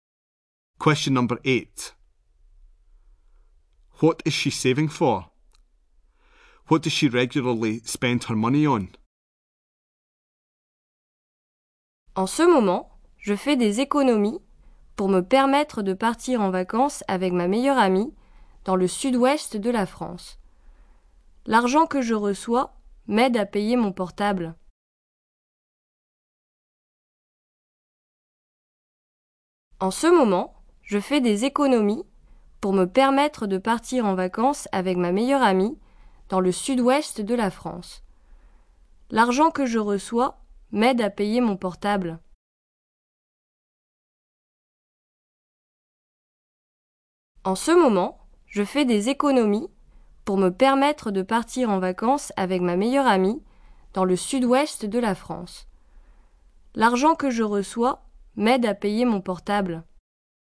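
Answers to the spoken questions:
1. A holiday with her best friend in the south-west of France
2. Her mobile phone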